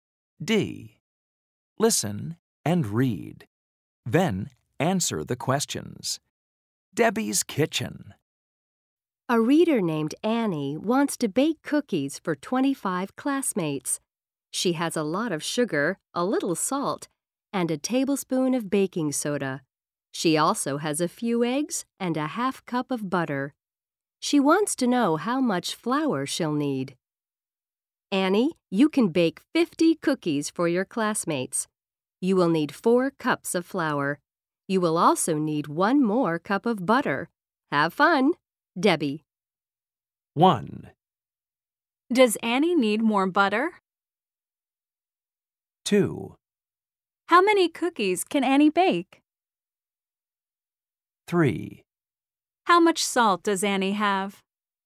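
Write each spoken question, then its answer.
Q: Does Annie need more butter?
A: Yes, she needs 1 more cup of butter.

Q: How many cookies can Annie bake?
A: 50 cookies

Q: How much salt does Annie have?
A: A little salt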